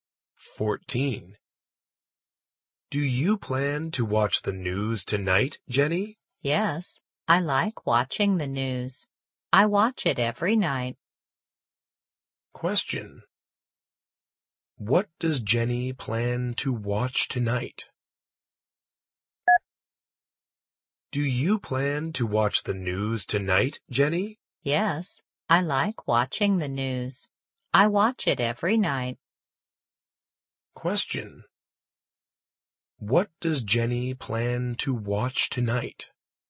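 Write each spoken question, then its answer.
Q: What does Jenny plan to watch tonight?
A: The news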